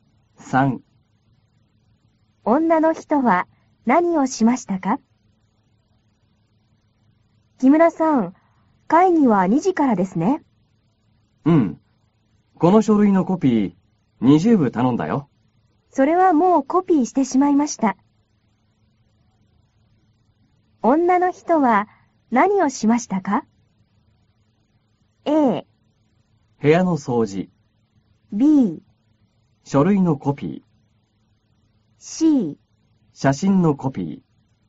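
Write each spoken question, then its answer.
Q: 女の人は何をしましたか?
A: B: 書類のコピー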